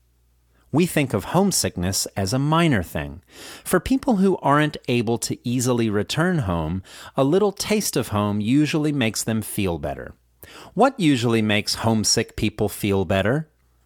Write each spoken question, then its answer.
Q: What usually makes homesick people feel better?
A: A little taste of home usually makes homesick people feel better.